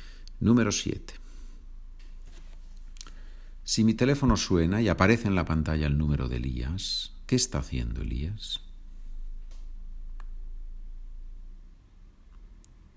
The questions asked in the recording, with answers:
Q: Si mi teléfono suena y aparece en la pantalla el número de Elías, ¿qué está haciendo Elías?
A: Elías me está llamando por teléfono